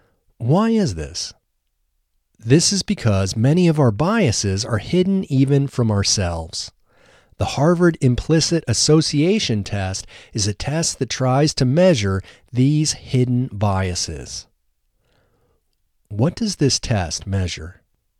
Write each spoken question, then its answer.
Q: What does this test measure?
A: This test measures hidden biases.